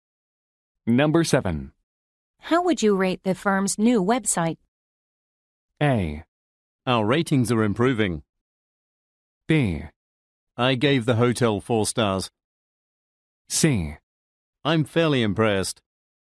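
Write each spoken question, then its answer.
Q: How would you rate the firm's new website?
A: C: I'm fairly impressed.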